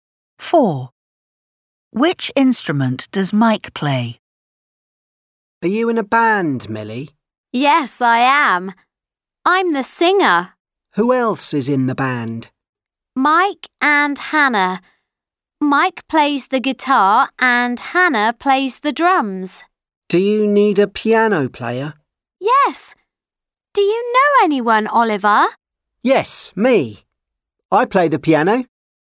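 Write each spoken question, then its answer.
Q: Which instrument does Mike play?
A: the guitar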